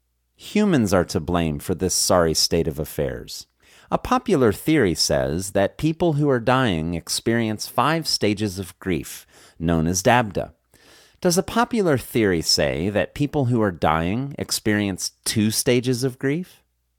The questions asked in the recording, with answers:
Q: Does a popular theory say that people who are dying experience two stages of grief?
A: No, a popular theory does not say that people who are dying experience two stages of grief.